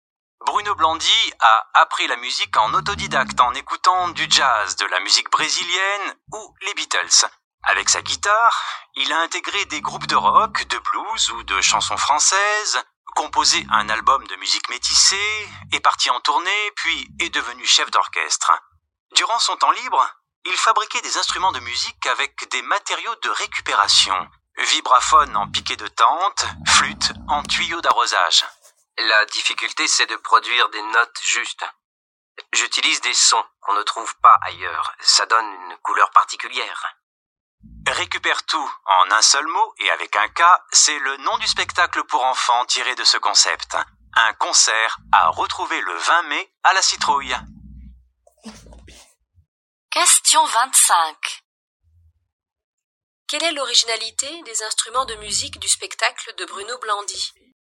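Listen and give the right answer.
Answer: Ils sont fabriqués avec des matériaux de récupération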